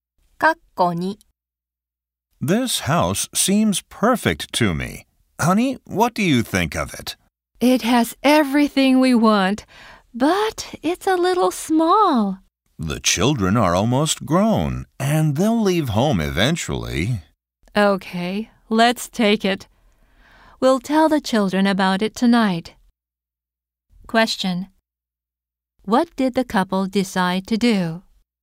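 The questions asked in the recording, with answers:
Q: What did the couple decide to do?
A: Buy/take the house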